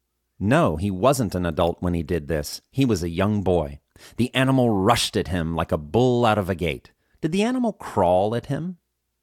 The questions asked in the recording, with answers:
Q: Did the animal crawl at him?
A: No, the animal didn't crawl at him.